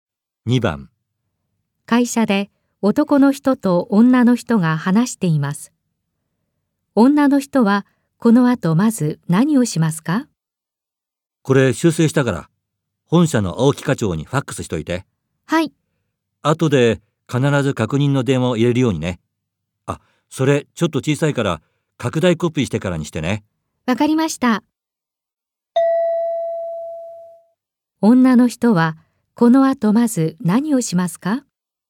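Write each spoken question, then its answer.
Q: 女の人はこの後まず何をしますか?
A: 拡大コピーをする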